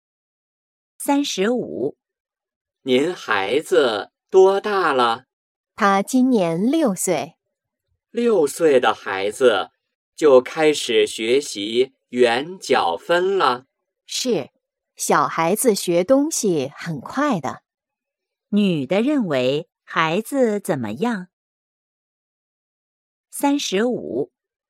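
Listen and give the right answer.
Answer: 小孩子学东西很快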